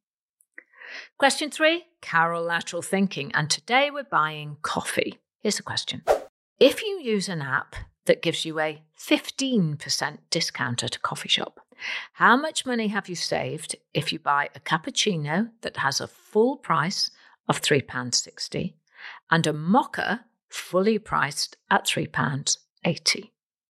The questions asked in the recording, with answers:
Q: If you use an app that gives you a 15% discount at a coffee shop, how much money have you saved if you buy a cappuccino that has a full price of £3.60 and a mocha fully priced at £3.80.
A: Okay, the answer is you would have saved £1.11.